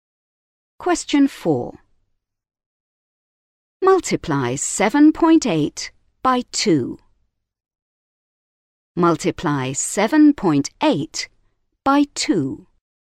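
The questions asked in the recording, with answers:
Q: Multiply 7.8 by 2.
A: 15.6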